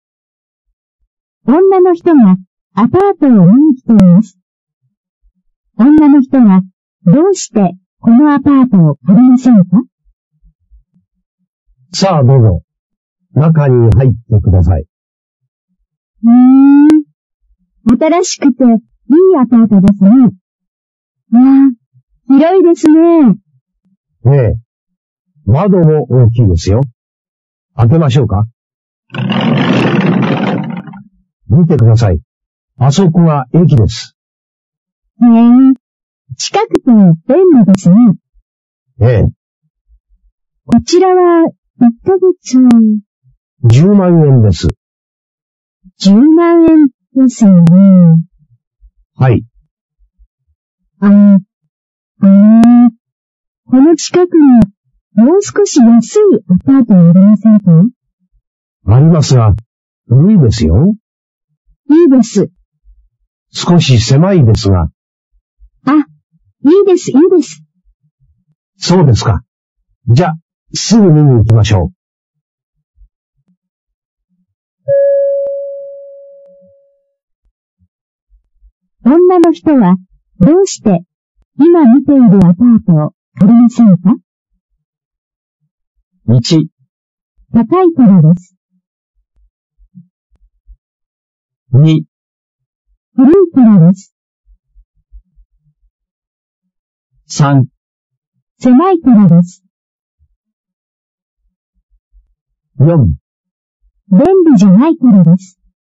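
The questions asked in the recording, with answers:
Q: 女の人は、どうして、今見ているアパートを借りませんか?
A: 1: 高いからです。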